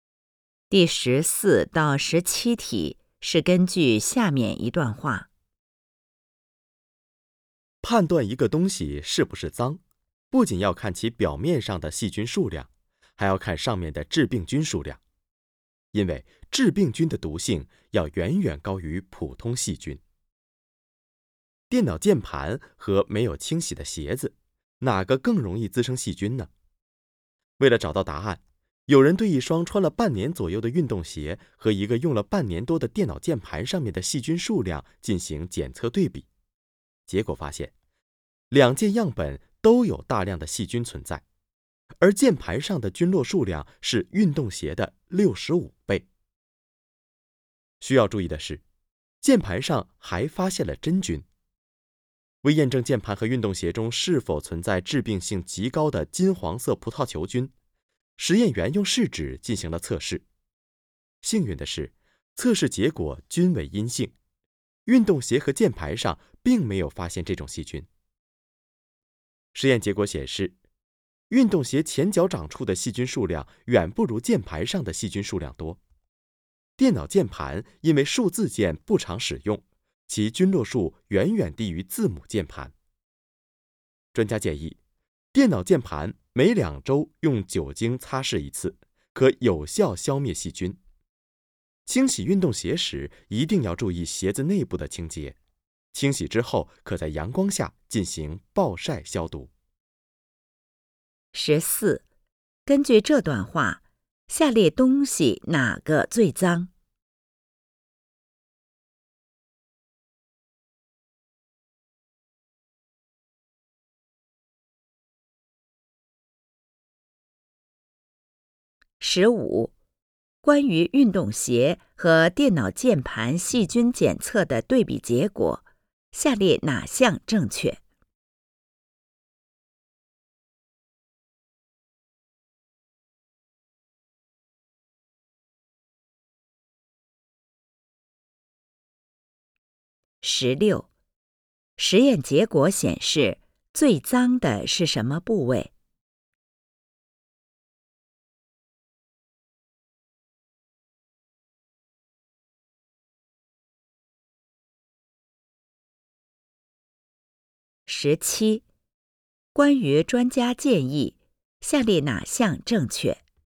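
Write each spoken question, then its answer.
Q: 根据这段话,下列东西哪个最脏?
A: 电脑键盘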